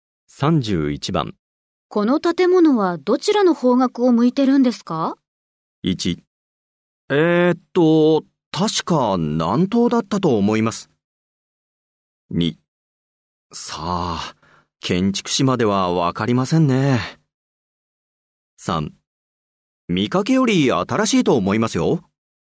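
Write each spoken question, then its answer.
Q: この建物はどちらの方角を向いてるんですか?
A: 1: 確か南東だったと思います。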